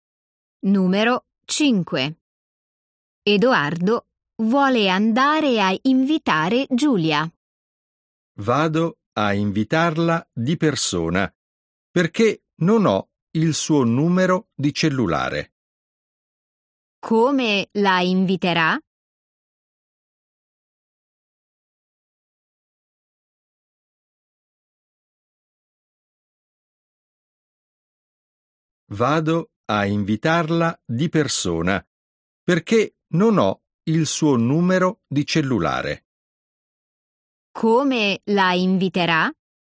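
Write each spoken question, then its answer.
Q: Come la inviterà?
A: di persona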